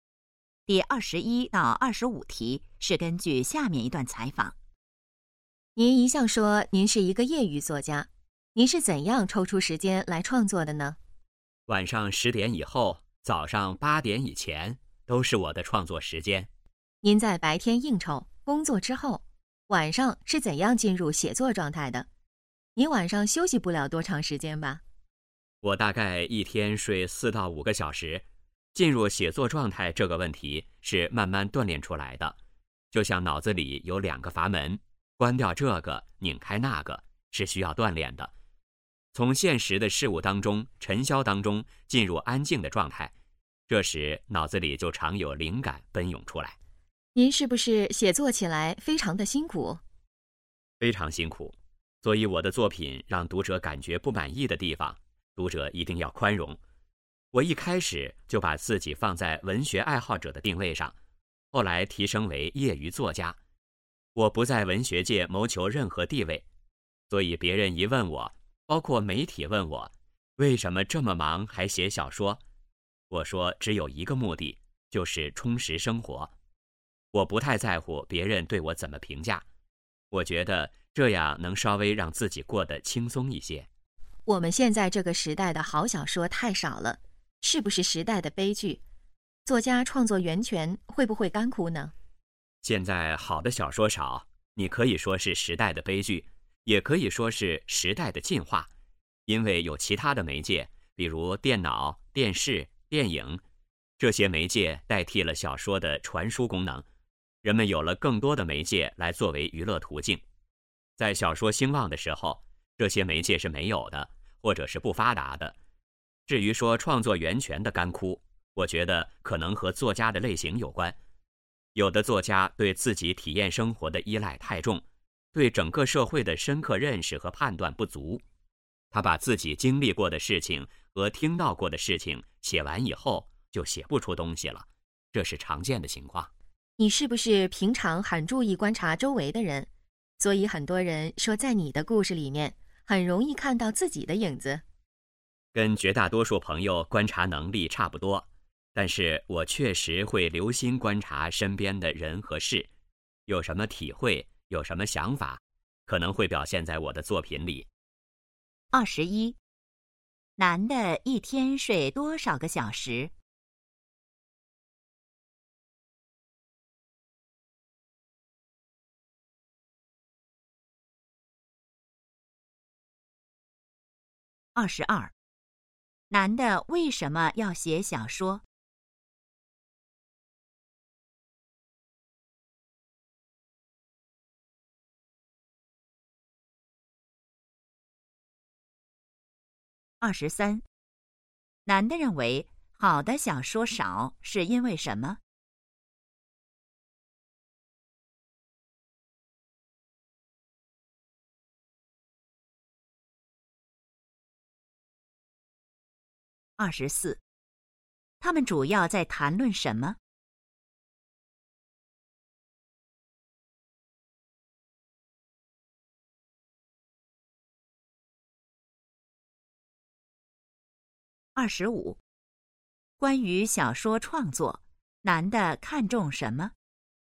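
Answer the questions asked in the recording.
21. 4到5个小时
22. 为了充实生活
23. 电脑、电视、电影等其他媒介代替了小说的功能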